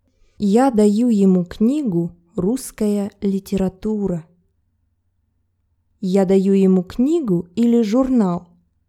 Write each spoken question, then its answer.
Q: Я даю ему книгу или журнал?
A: Книгу. Я даю ему книгу.